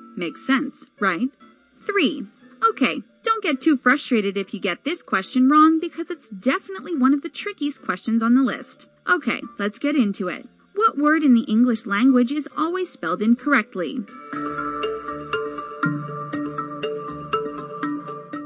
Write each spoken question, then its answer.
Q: What word in the English language is always spelled incorrectly?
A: The correct answer is incorrectly.